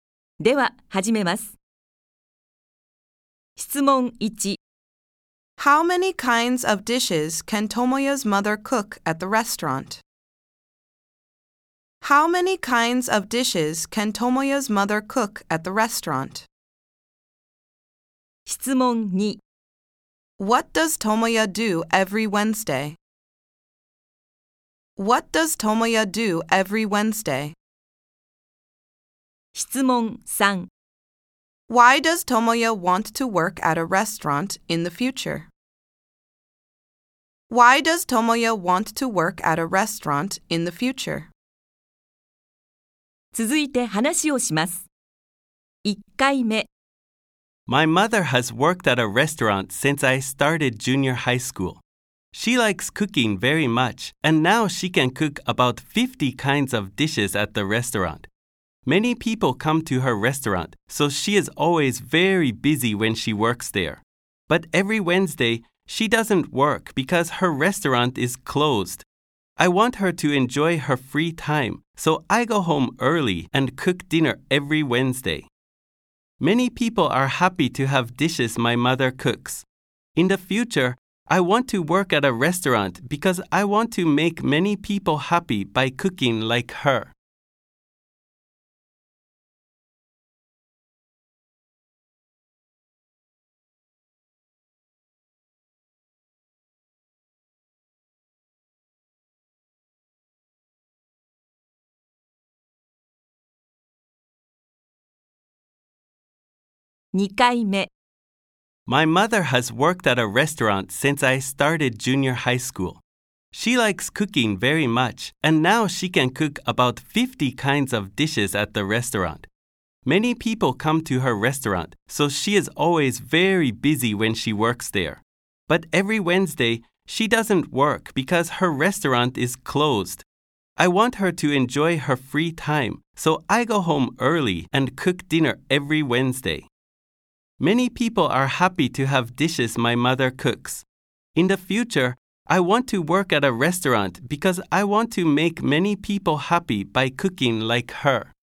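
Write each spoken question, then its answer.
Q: How many kinds of dishes can Tomoya's mother cook at the restaurant?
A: About 50

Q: What does Tomoya do every Wednesday?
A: He goes home early and cooks dinner

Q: Why does Tomoya want to work at a restaurant in the future?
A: Because he wants to make many people happy by cooking like his mother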